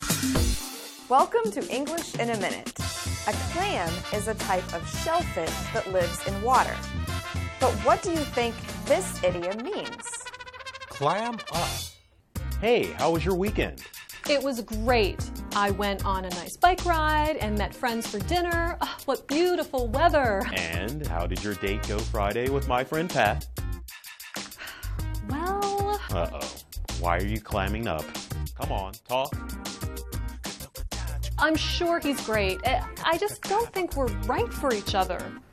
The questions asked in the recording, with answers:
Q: But what do you think this idiom means?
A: To clam up means to say nothing or stop talking.